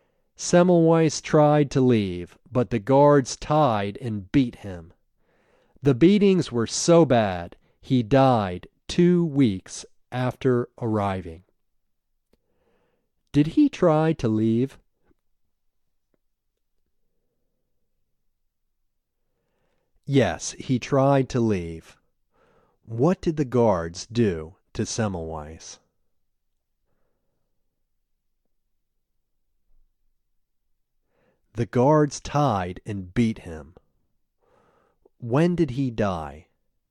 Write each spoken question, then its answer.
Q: Did he try to leave?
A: Yes, he tried to leave.

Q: What did the guards do to Semmelweis?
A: The guards tied and beat him.

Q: When did he die?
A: He died 2 weeks after arriving.